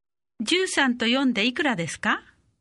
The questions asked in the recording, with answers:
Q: 13と4でいくらですか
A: 17